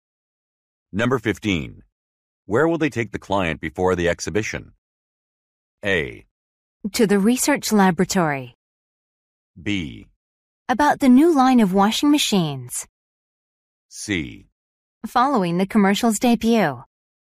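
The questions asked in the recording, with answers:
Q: Where will they take the client before the exhibition?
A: A: To the research laboratory.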